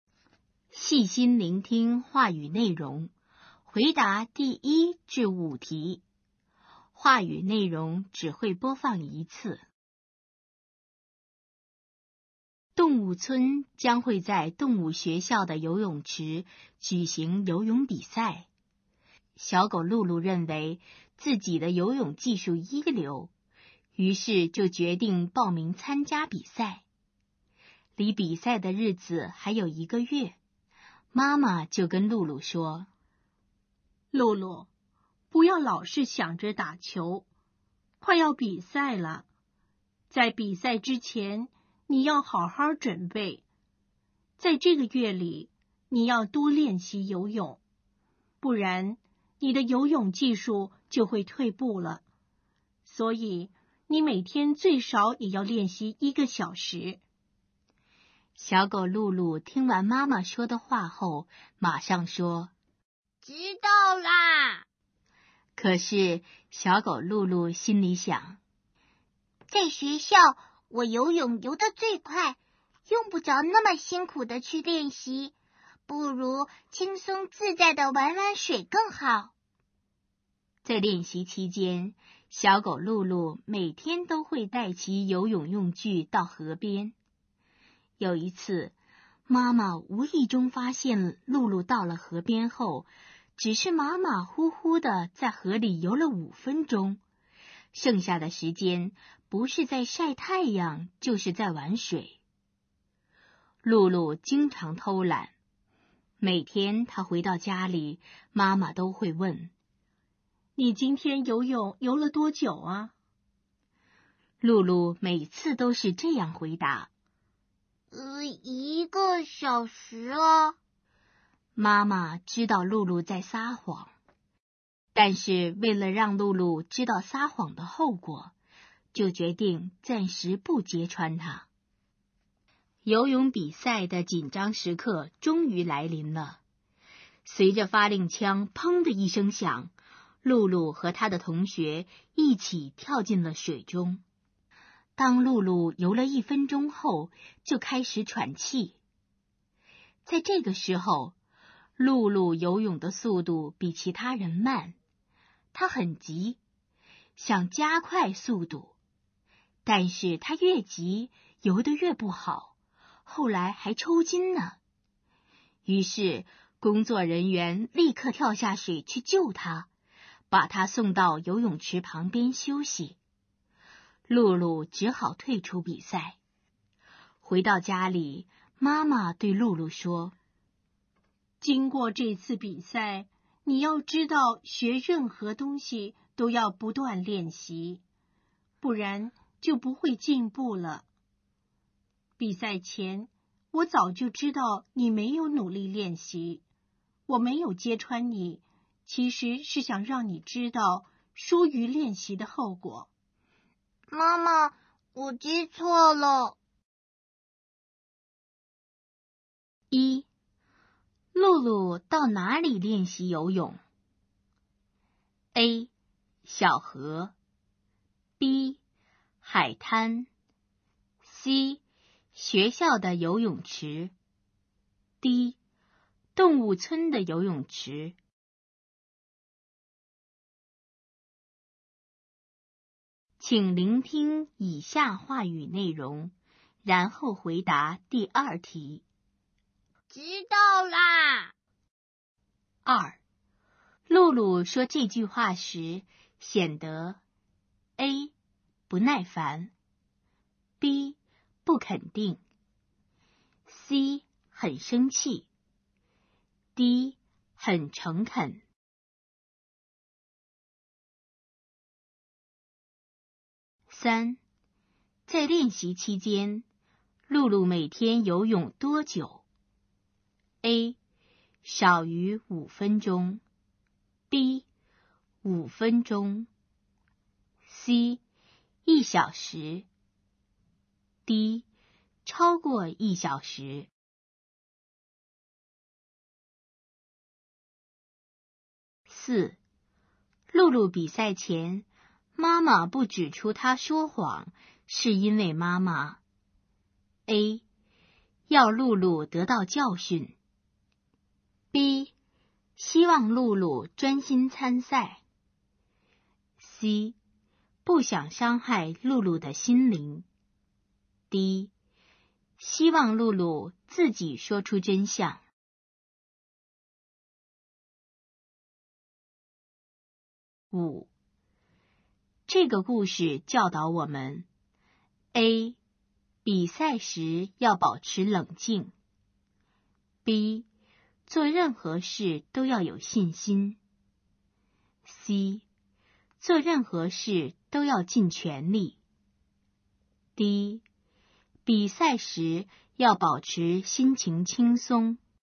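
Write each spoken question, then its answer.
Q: 露露到哪里练习游泳?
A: A: 小河

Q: 在练习期间,露露每天游泳多久?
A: B: 五分钟

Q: 露露比赛前,妈妈不指出她说谎,是因为妈妈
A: A: 要露露得到教训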